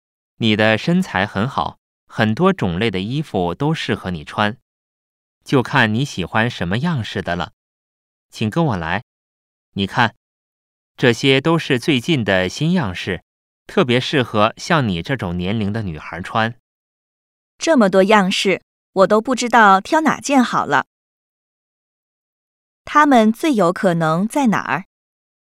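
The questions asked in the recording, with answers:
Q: 它们最有可能在哪儿?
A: 服装店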